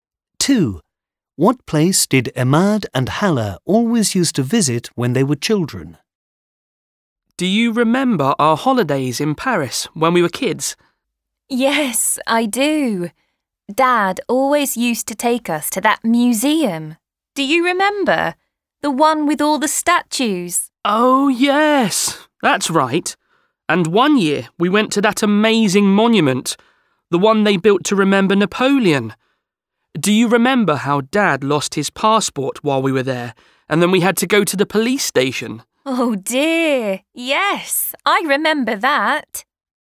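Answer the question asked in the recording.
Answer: A museum with statues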